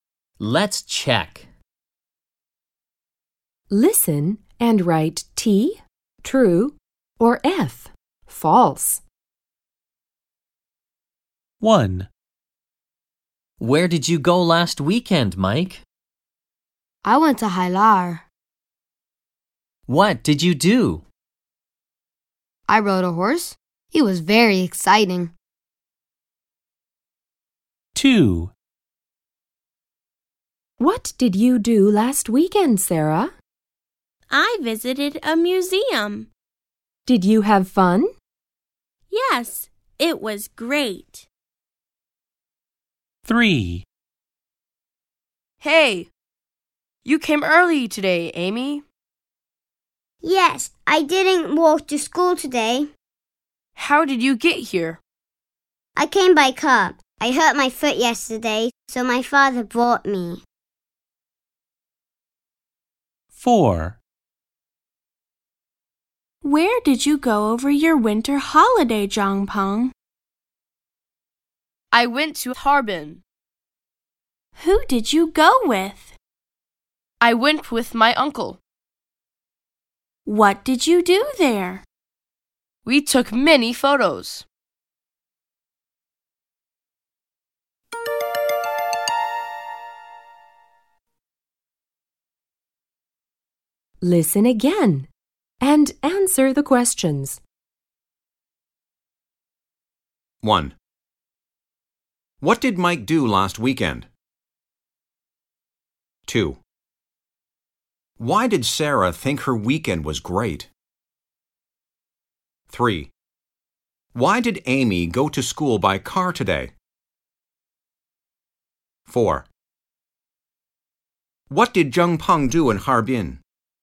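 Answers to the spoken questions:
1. He rode a horse.
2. She visited a museum.
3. She hurt her foot yesterday.
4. He took many photos.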